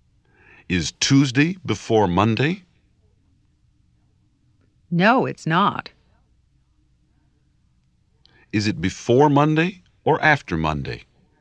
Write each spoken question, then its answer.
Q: Is Tuesday before Monday?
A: No, it's not.